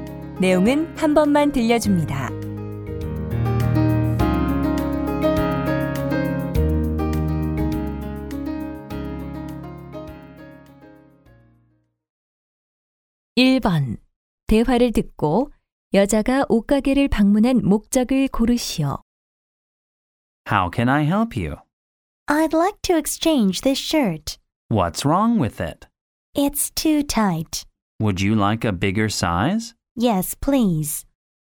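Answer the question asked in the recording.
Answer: 셔츠를 교환하기 위해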